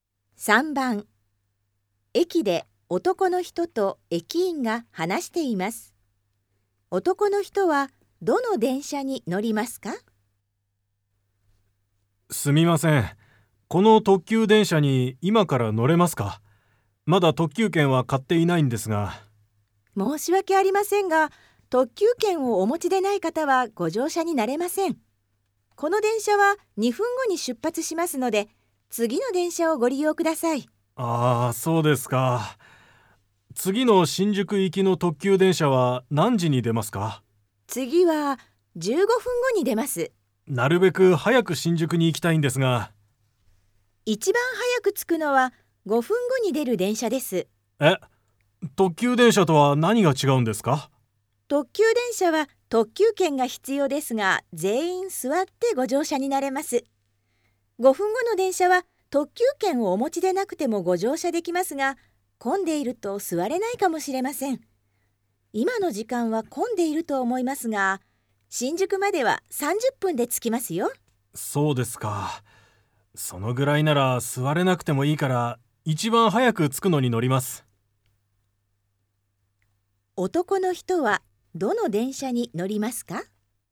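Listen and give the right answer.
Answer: 5分後に出る電車(特急券のいらない電車)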